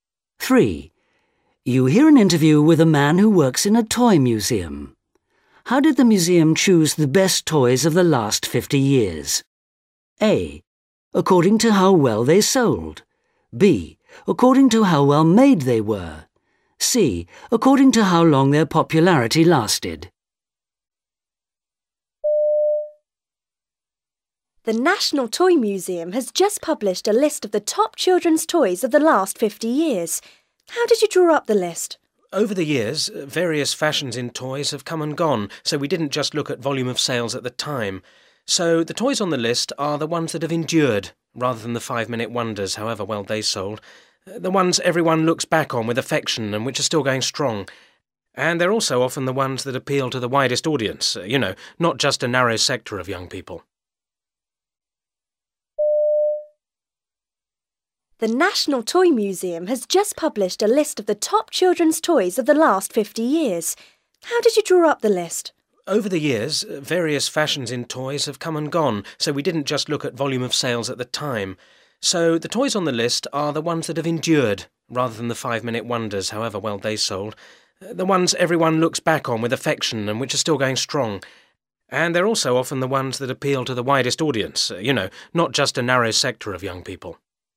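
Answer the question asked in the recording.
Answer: C: According to how long their popularity lasted.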